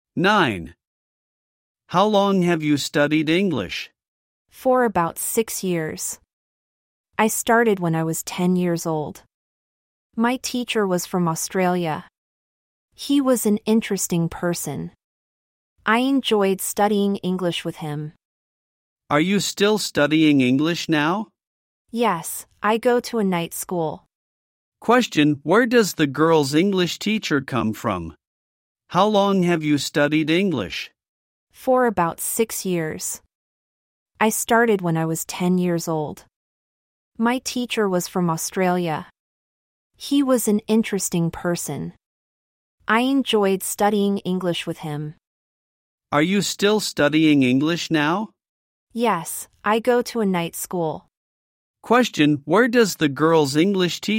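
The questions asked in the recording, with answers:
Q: Question, where does the girl's English teacher come from?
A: Australia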